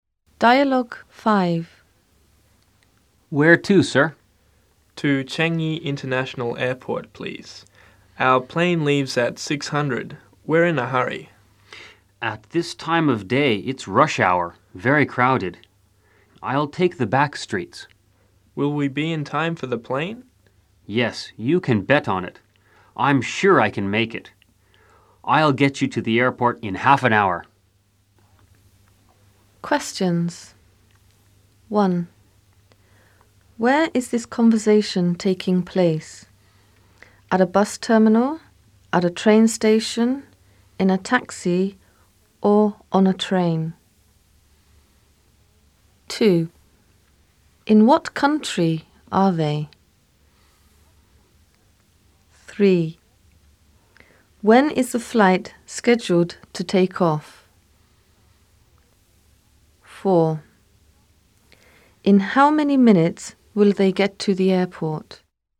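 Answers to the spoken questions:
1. in a taxi
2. Singapore
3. At 6:00
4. 30 minutes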